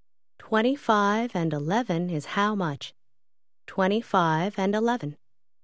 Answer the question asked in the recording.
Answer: 36.